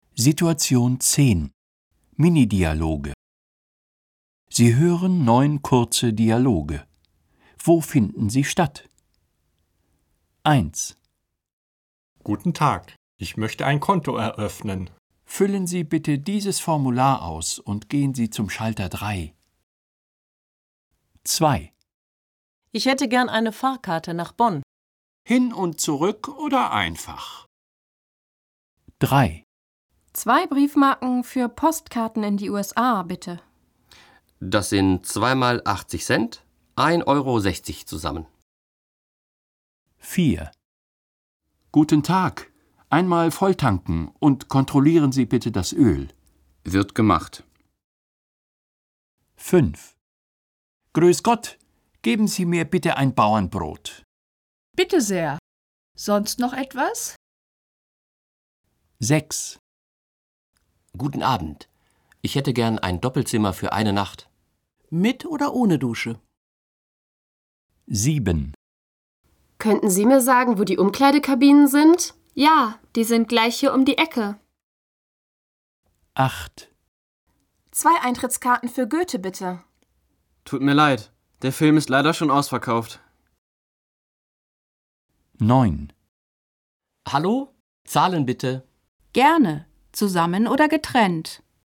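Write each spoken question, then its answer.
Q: Wo finden sie statt?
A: In der Bank

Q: Wo finden sie statt?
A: Am Bahnhof

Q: Wo finden sie statt?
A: Auf der Post

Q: Wo finden sie statt?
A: An der Tankstelle

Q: Wo finden sie statt?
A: In der Bäckerei

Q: Wo finden sie statt?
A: Im Hotel

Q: Wo finden sie statt?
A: Im Kino

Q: Wo finden sie statt?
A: Im Restaurant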